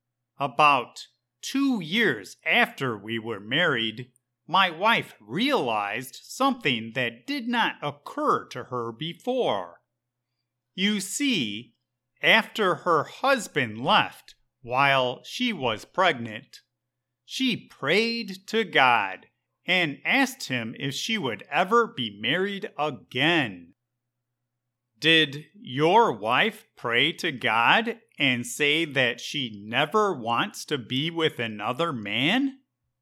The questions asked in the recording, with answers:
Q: Did your wife pray to God and say that she never wants to be with another man?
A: No. She prayed to God and asked him if she would ever be married again.